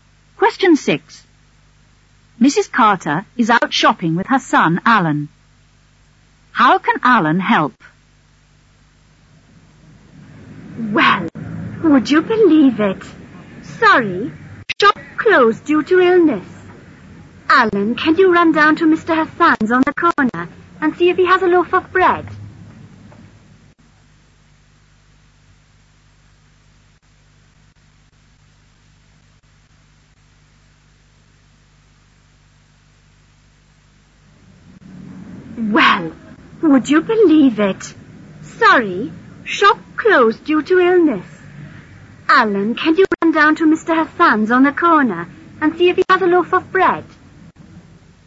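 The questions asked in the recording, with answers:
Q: How can Alan help?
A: By going to Mr Hassan's shop on the corner to see if he has a loaf of bread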